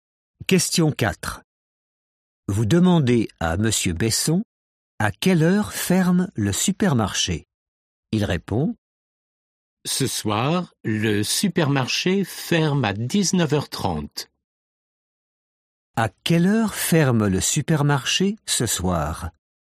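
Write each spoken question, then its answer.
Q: À quelle heure ferme le supermarché ce soir?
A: à 19h30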